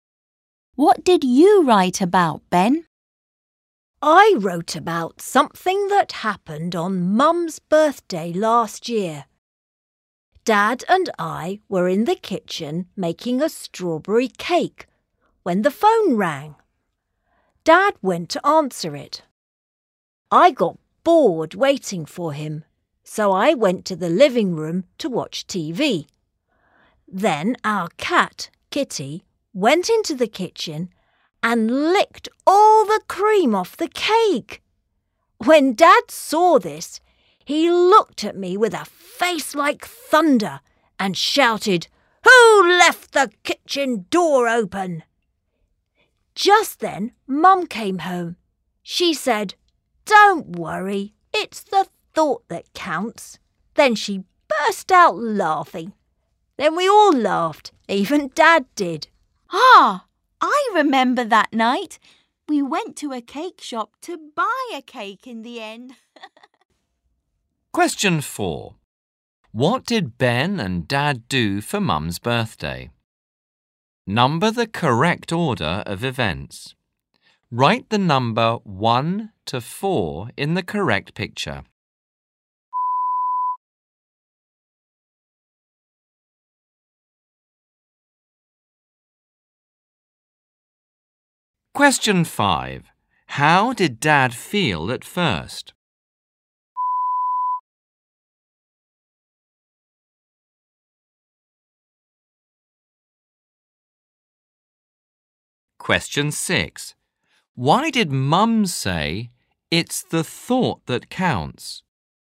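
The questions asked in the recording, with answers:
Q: How did Dad feel at first?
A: angry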